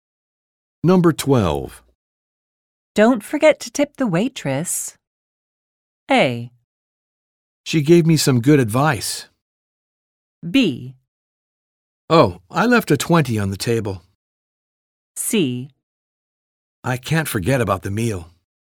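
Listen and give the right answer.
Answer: B: Oh, I left a 20 on the table.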